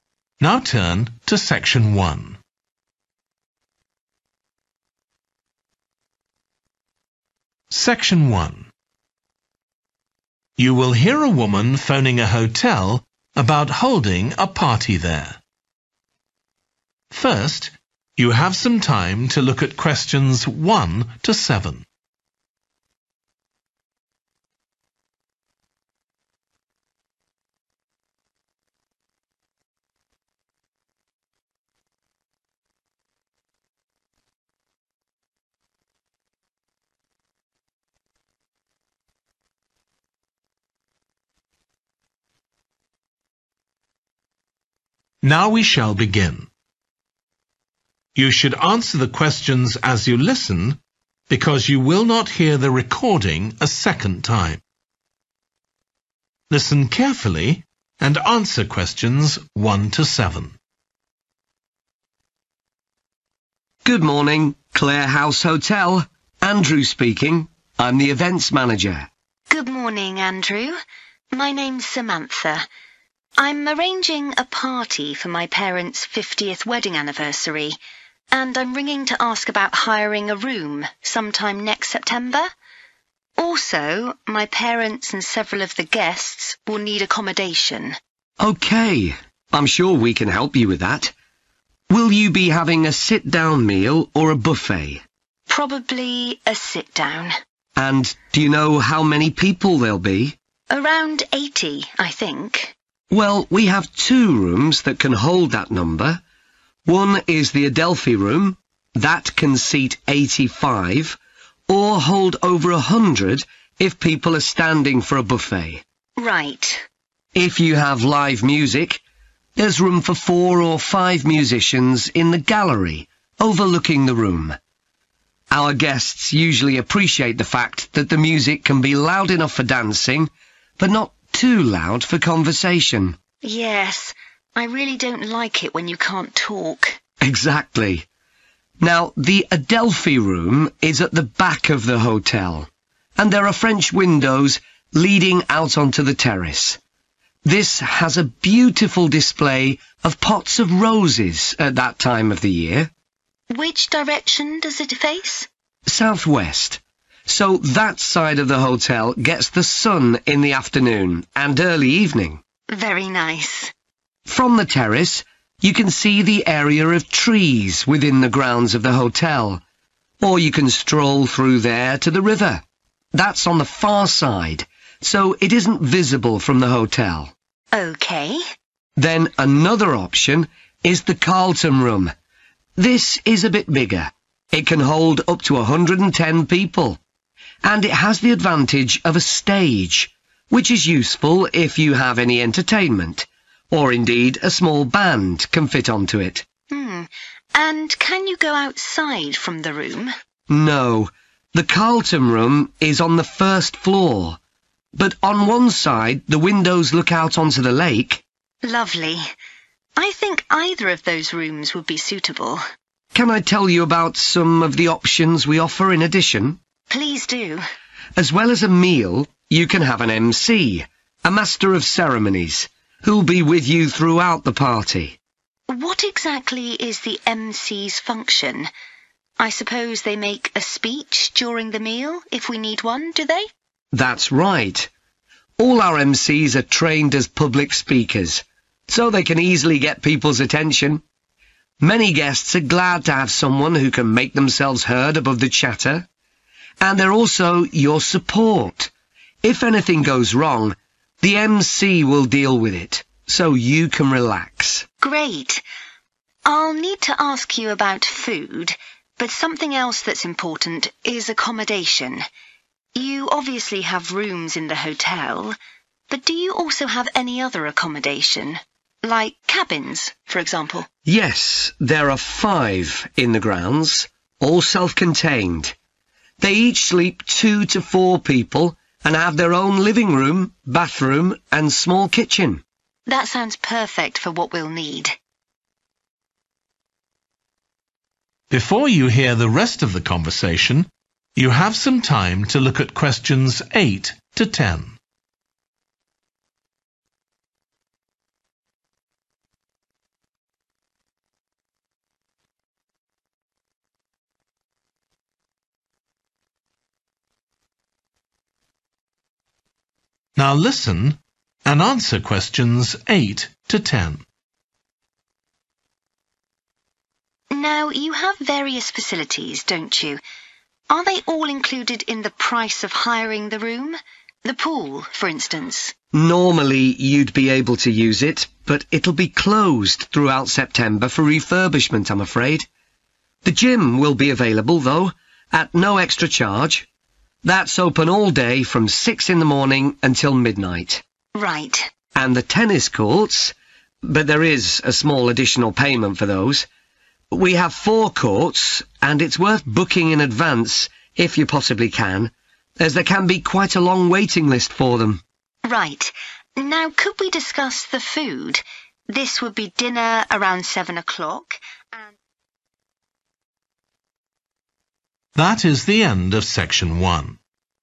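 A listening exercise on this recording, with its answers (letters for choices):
Complete the notes below. Write ONE WORD AND/ OR A NUMBER for each answer.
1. Adelphi Room – number of people who can sit down to eat: (1)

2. can go out and see the (2) in pots on the terrace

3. terrace has a view of a group of (3)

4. has a (4)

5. can give a (5) while people are eating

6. will provide (6) if there are any problems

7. Accommodation: in hotel rooms or (7)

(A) included in cost of hiring room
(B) available at extra charge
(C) not available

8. outdoor swimming pool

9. gym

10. tennis courts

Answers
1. 85
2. roses
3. trees
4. stage
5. speech
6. support
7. cabins
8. C
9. A
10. B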